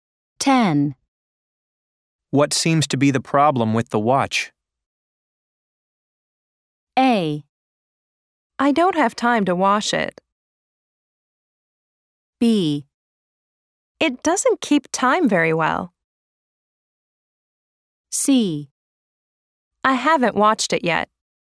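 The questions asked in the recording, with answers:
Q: What seems to be the problem with the watch?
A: B: It doesn't keep time very well.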